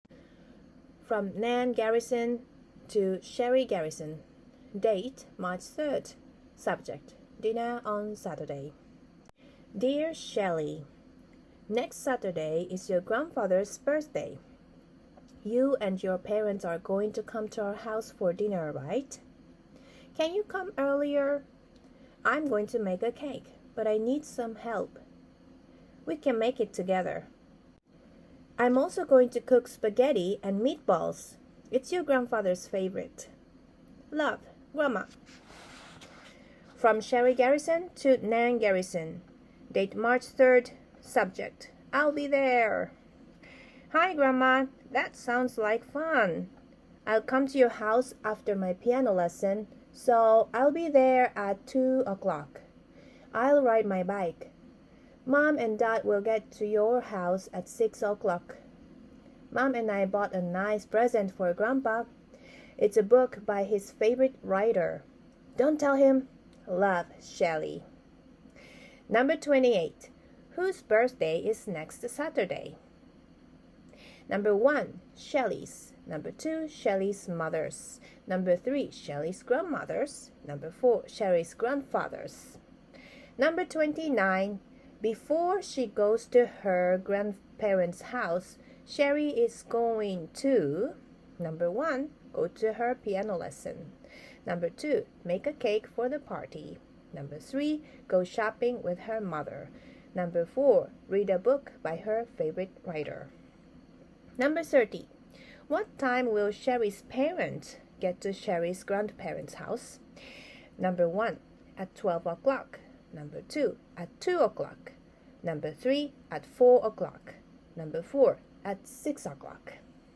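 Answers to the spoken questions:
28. 4: Sherry's grandfather's
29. 1: go to her piano lesson
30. 4: at 6 o'clock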